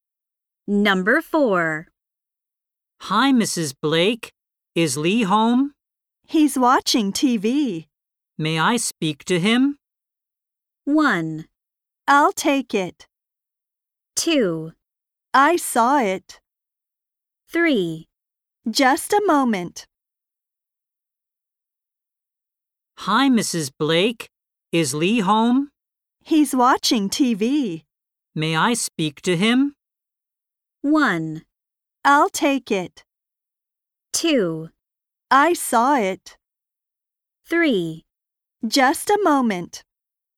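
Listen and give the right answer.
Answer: 3: Just a moment.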